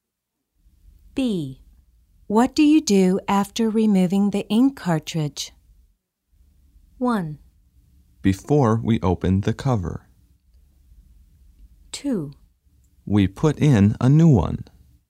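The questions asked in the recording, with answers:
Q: What do you do after removing the ink cartridge?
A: 2: We put in a new one.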